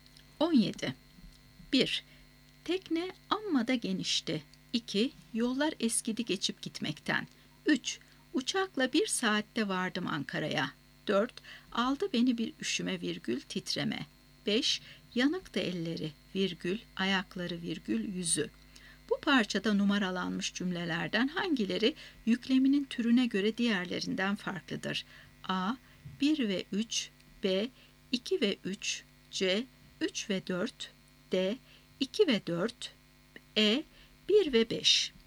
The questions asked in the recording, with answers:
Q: Bu parçada numaralanmış cümlelerden hangileri yükleminin türüne göre diğerlerinden farklıdır?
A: Doğru cevap E şıkkı. 1 ve 5.